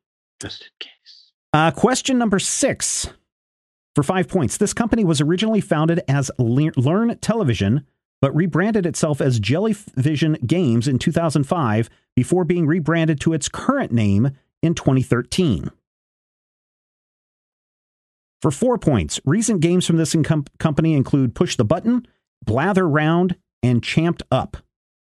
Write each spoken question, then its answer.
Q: This company was originally founded as Learn Television, but rebranded itself as Jellyvision Games in 2005 before being rebranded to its current name in 2013.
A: That is correct.